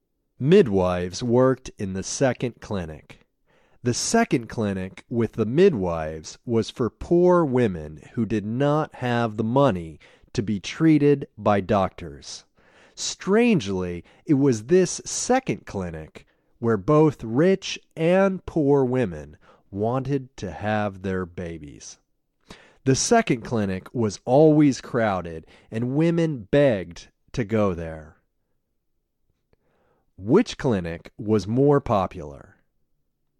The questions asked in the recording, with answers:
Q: Which clinic was more popular?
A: The second clinic was more popular.